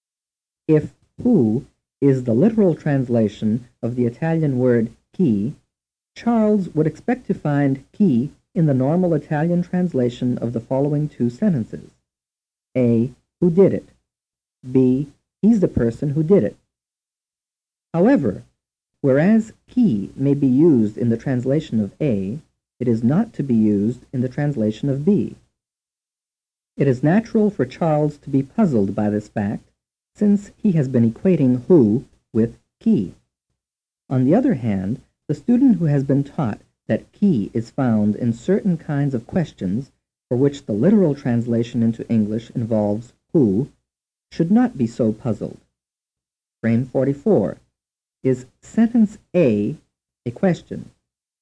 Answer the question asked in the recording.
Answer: The answer is yes.